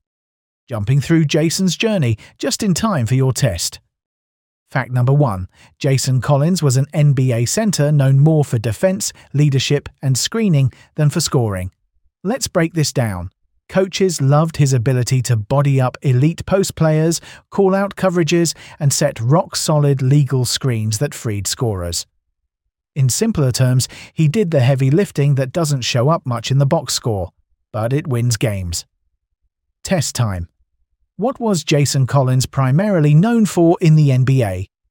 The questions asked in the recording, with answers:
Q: What was Jason Collins primarily known for in the NBA?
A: defense and leadership.